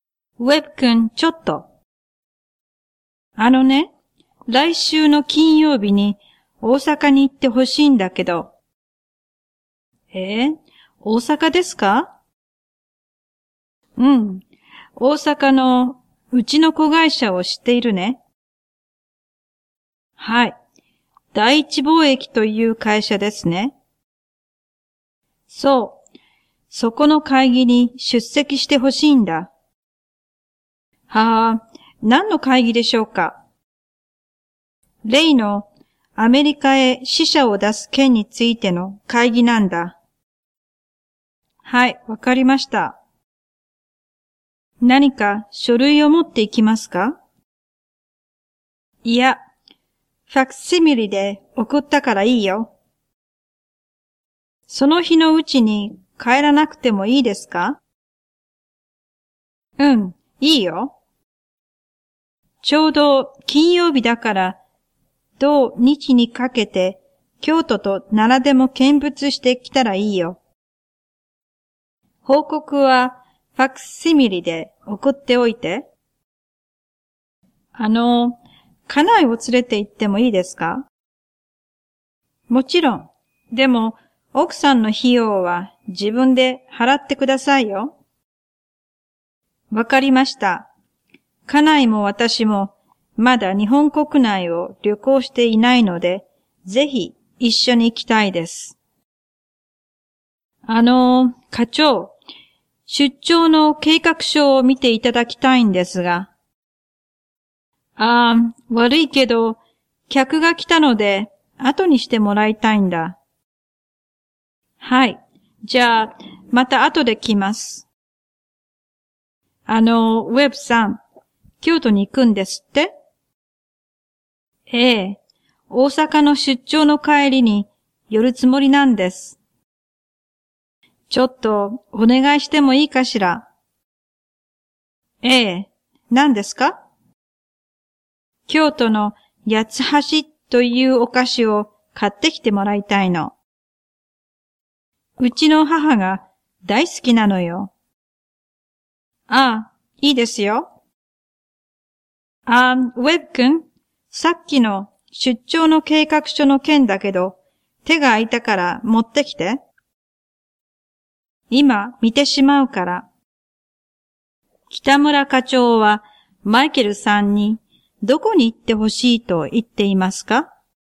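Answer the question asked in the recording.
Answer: 大阪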